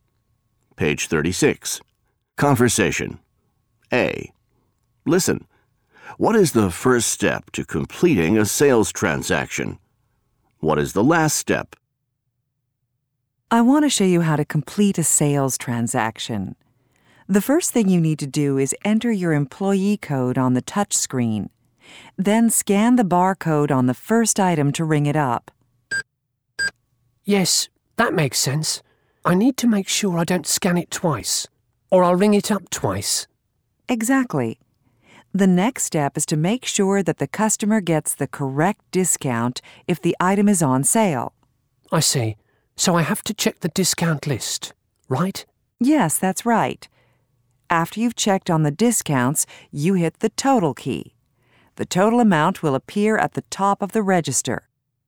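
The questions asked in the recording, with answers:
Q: What is the first step to completing a sales transaction?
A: Enter your employee code on the touch screen.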